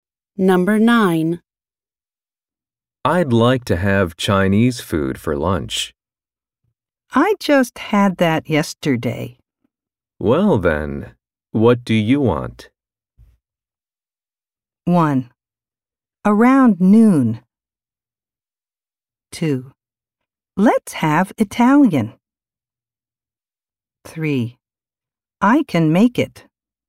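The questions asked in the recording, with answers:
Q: Well, then, what do you want?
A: 2: Let's have Italian.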